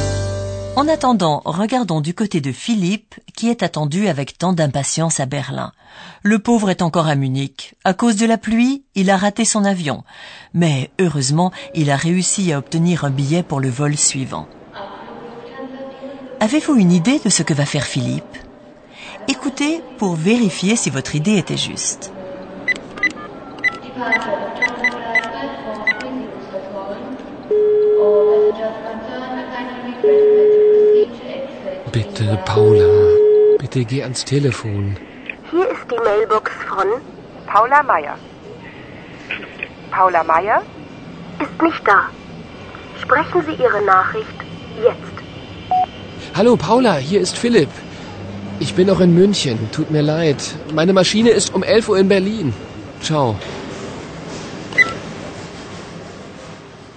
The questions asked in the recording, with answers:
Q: Avez-vous une idée de ce que va faire Philippe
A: vous aurez certainement compris que Philippe essaye d'appeler Paola.